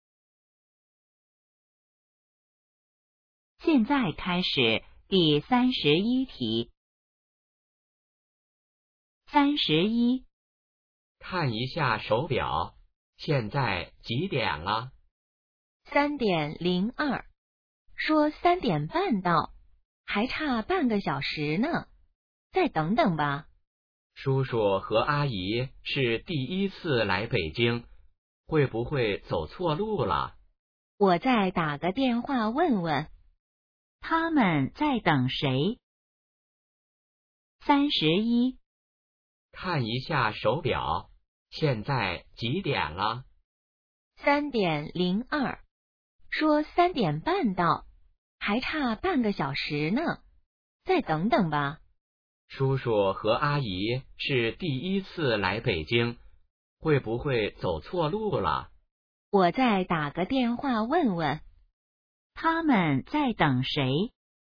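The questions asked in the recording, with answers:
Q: 他们在等谁?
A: 叔叔和阿姨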